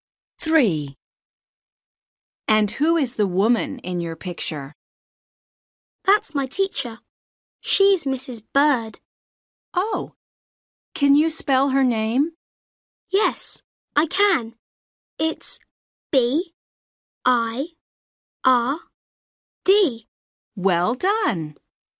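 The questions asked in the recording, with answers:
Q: And who is the woman in your picture?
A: Mrs. Bird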